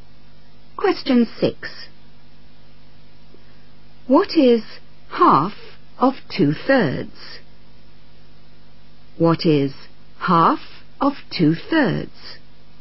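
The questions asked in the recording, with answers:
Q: What is half of 2/3?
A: 1/3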